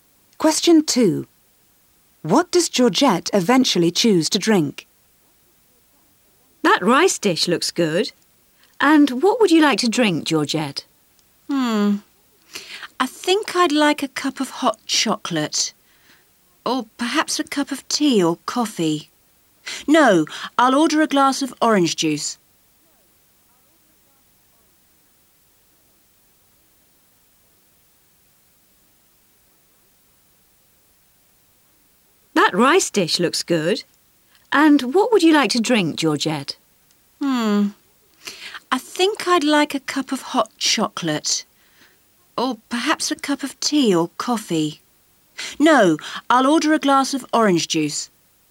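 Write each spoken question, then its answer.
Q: What does Georgette eventually choose to drink?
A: A glass of orange juice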